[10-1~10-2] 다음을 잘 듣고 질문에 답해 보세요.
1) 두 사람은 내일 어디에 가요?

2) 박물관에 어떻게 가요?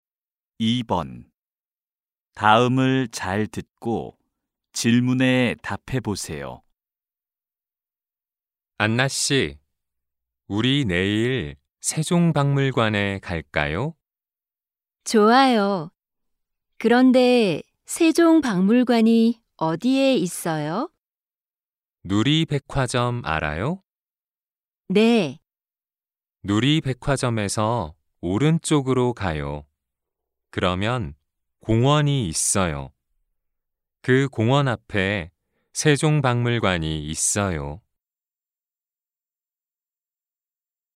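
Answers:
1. 세종박물관
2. 누리백화점에서 오른쪽으로 가면 공원이 있고, 그 공원 앞에 있어요

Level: 1B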